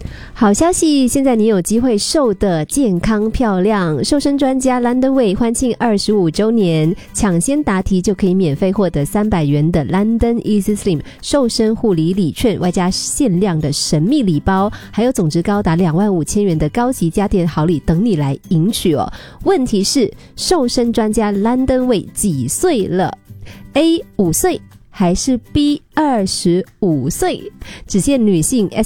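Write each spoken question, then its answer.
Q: 问题是,瘦身专家 LondonWay 几岁了? A5岁还是 B25岁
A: B: 25岁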